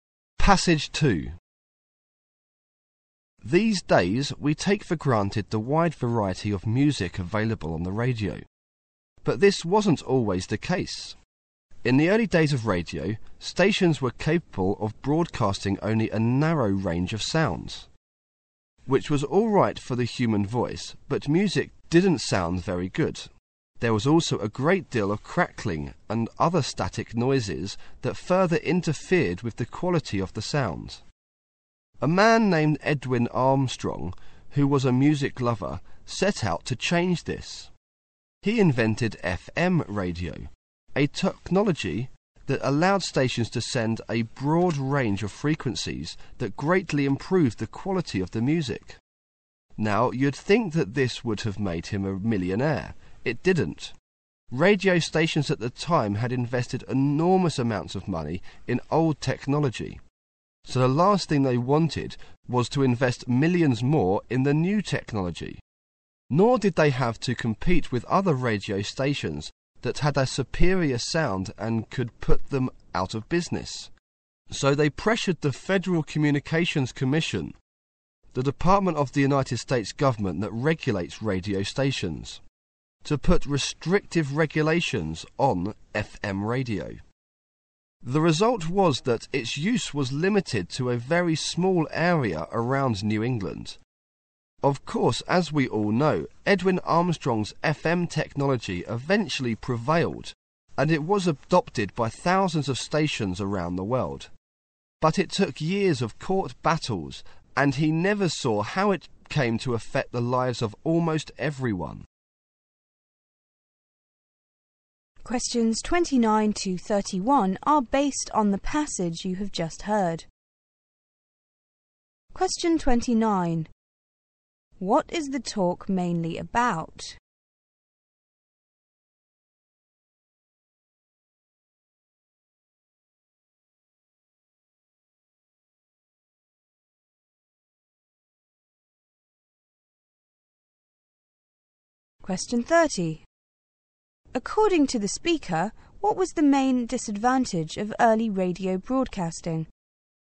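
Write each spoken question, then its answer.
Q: What is the talk mainly about?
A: Edwin Armstrong's invention of FM radio

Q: According to the speaker, what was the main disadvantage of early radio broadcasting?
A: It could broadcast only a narrow range of sounds, so music sounded poor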